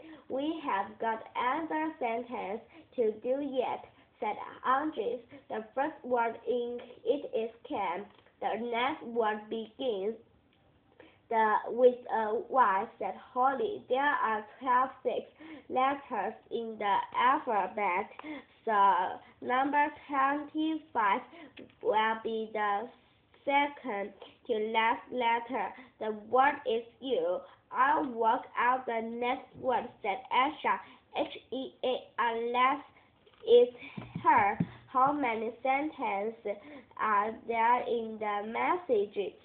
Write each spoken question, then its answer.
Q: How many sentences are there in the message?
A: There are 2 sentences in the message.